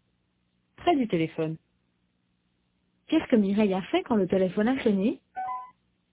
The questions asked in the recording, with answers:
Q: Qu'est-ce que Mireille a fait quand le téléphone a sonné?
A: Elle a décroché.